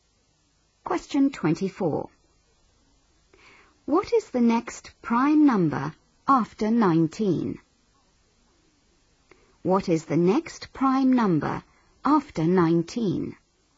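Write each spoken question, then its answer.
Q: What is the next prime number after 19?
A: 23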